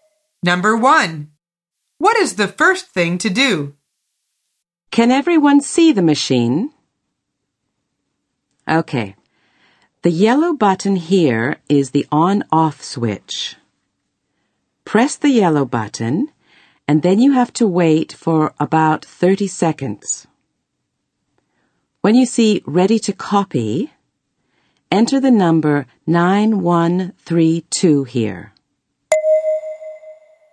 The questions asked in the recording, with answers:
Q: What is the first thing to do?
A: The answer is you should press the yellow button.